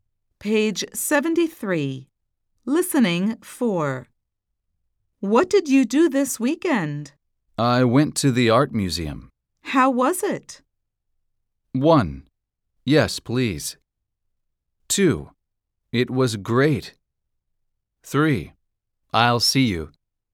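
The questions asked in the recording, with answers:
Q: How was it?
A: 2: It was great.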